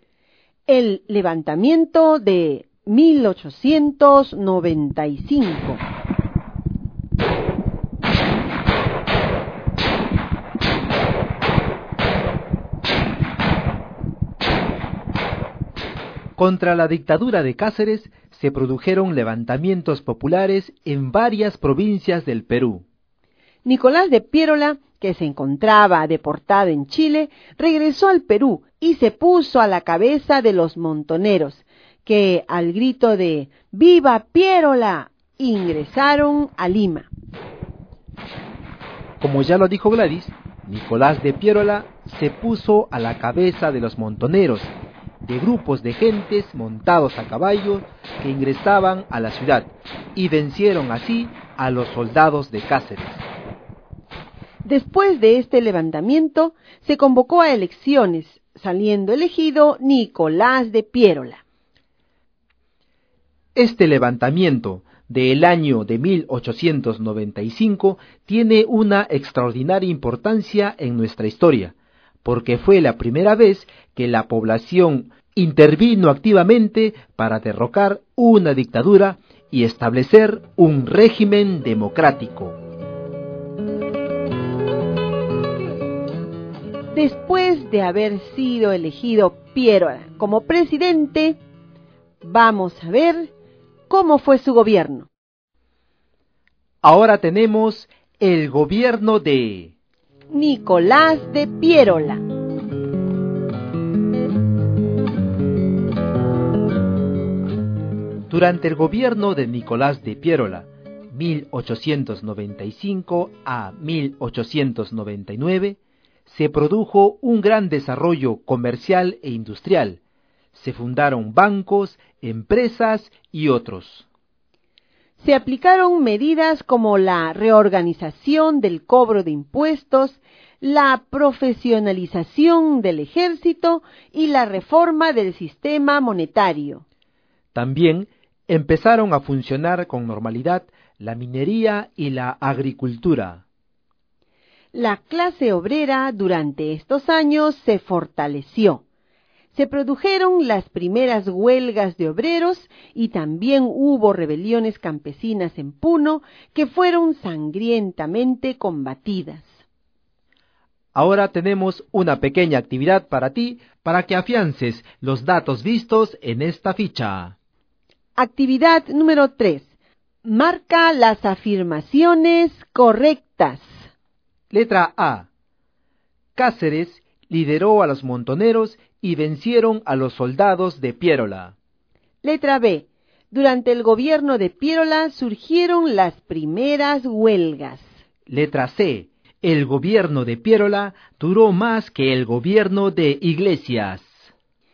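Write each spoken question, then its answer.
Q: Letra A. Cáceres lideró a los montoneros y vencieron a los soldados de Piérola.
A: Incorrecta

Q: Letra B. Durante el gobierno de Piérola surgieron las primeras huelgas.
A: Correcta

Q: Letra C. El gobierno de Piérola duró más que el gobierno de Iglesias.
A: Correcta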